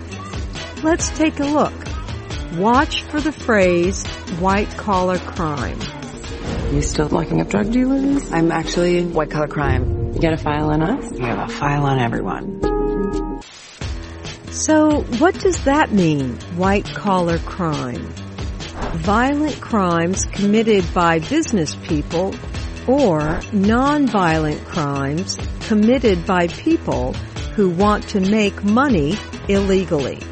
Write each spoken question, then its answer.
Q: So, what does that mean, white-collar crime?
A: White-collar crime is a non-violent crime committed by people who want to make money illegally.